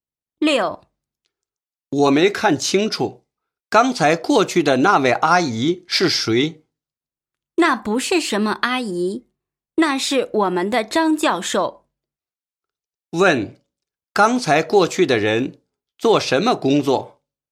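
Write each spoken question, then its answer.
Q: 问,刚才过去的人做什么工作?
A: 教授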